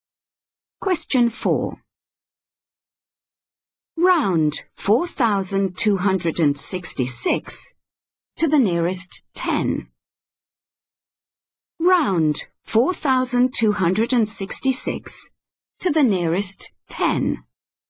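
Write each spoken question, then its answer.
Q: Round 4,266 to the nearest 10.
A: 4,270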